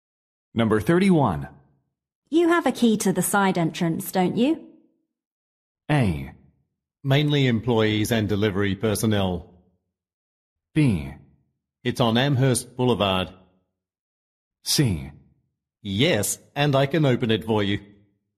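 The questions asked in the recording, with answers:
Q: You have a key to the side entrance, don't you?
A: C: Yes, and I can open it for you.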